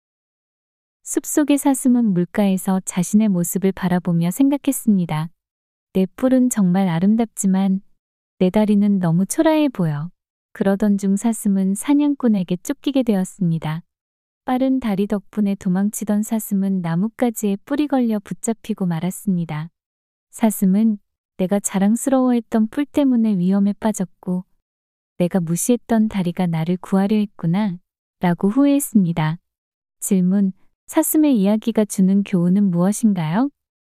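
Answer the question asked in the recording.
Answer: 겉모습보다 실제로 쓸모 있는 것이 더 소중하다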